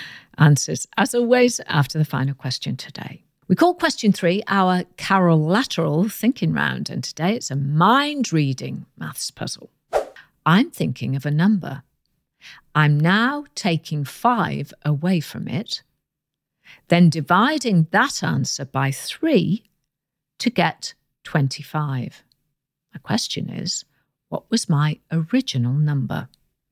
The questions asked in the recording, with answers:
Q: My question is, what was my original number?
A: And the answer is 80.